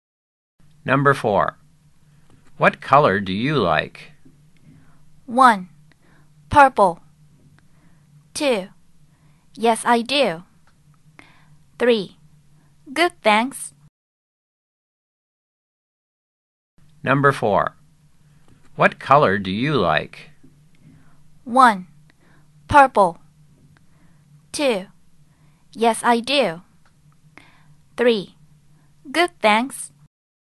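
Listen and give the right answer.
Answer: 1: Purple.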